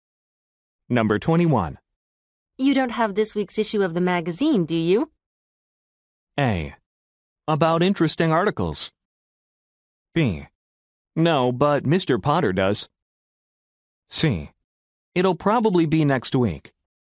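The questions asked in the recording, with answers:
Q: You don't have this week's issue of the magazine, do you?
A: B: No, but Mr. Potter does.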